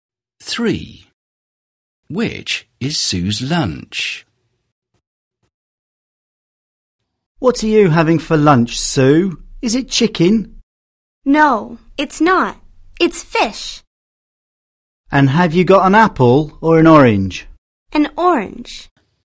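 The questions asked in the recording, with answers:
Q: Which is Sue's lunch?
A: Fish and an orange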